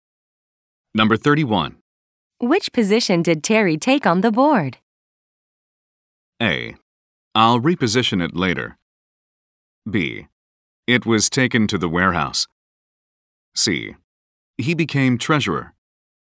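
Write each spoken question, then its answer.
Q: Which position did Terry take on the board?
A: C: He became treasurer.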